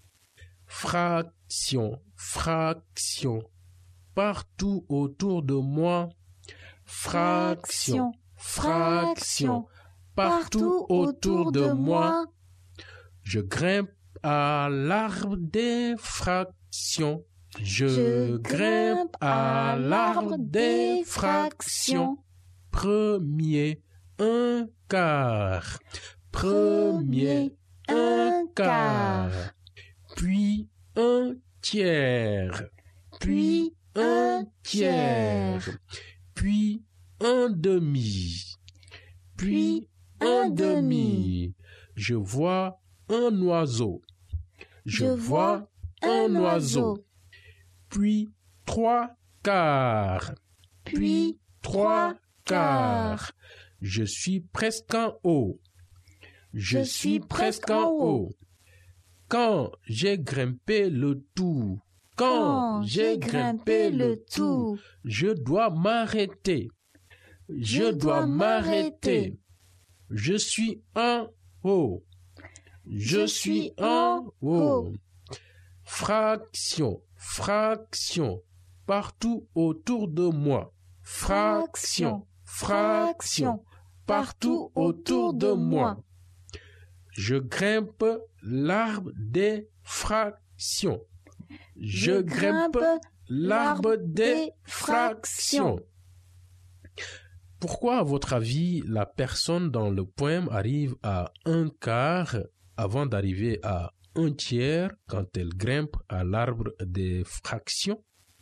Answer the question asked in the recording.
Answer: Car un quart est plus bas?